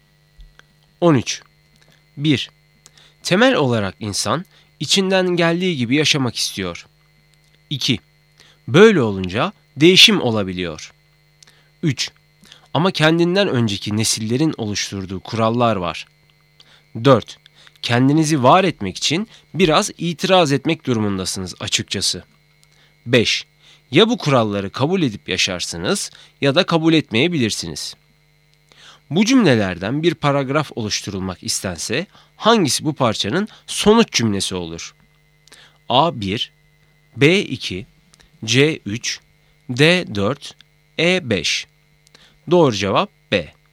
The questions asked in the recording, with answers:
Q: Bu cümlelerden bir paragraf oluşturulmak istense hangisi bu parçanın sonuç cümlesi olur?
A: Doğru cevap B.